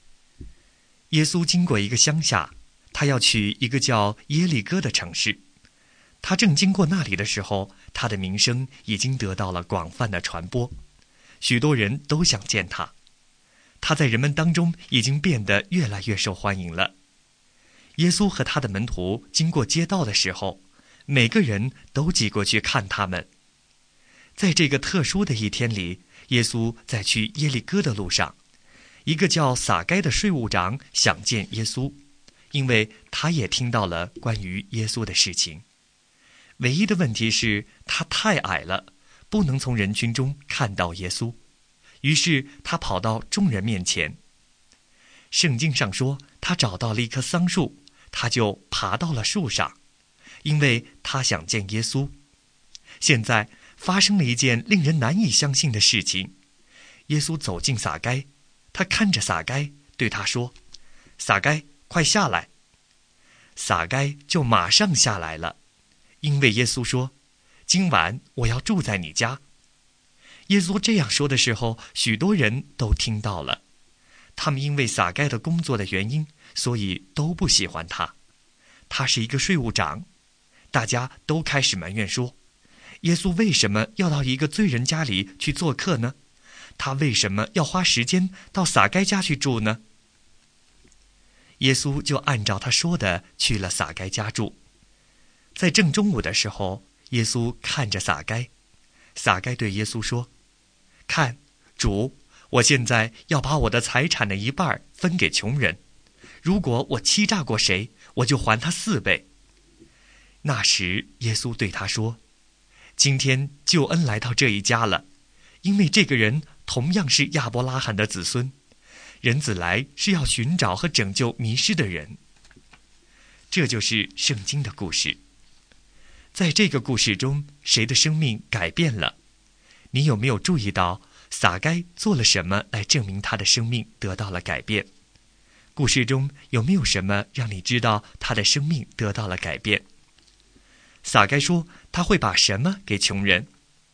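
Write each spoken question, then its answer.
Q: 在这个故事中,谁的生命改变了?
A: 撒该

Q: 你有没有注意到撒该做了什么来证明他的生命得到了改变?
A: 他把一半财产分给穷人,欺诈过谁就还他四倍

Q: 撒该说他会把什么给穷人?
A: 他财产的一半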